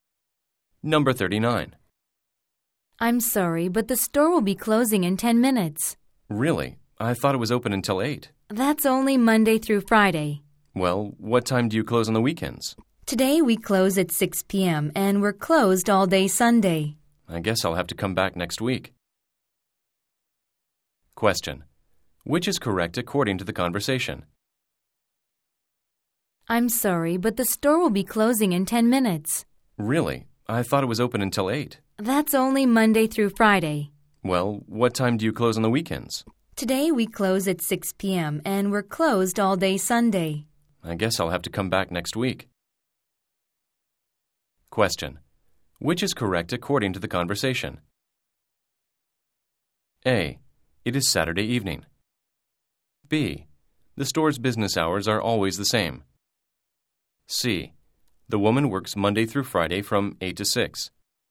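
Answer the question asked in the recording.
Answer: A: It is Saturday evening.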